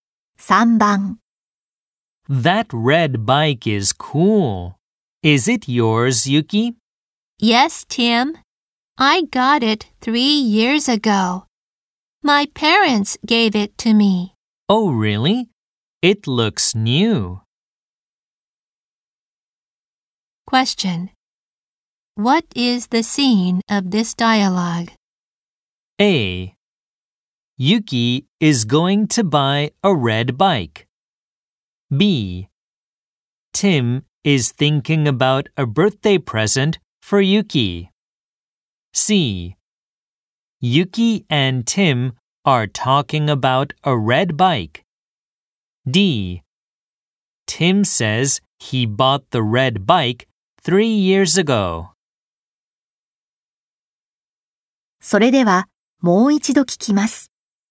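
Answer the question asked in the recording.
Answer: C: Yuki and Tim are talking about a red bike.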